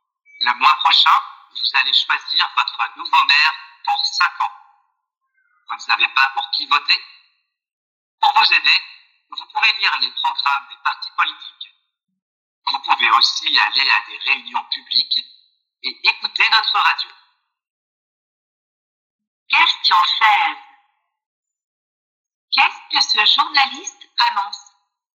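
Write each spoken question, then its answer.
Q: Qu'est-ce que ce journaliste annonce?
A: Des élections municipales : le choix du nouveau maire le mois prochain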